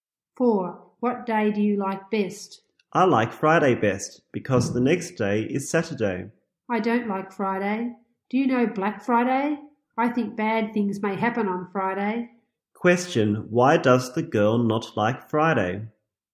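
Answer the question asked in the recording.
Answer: She thinks bad things may happen on Friday.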